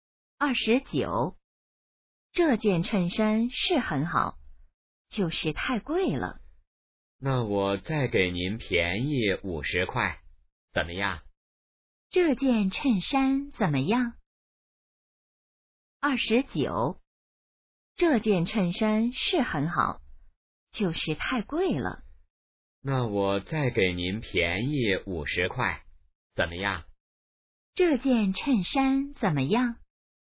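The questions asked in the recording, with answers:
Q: 这件衬衫怎么样?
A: 很好,但是太贵了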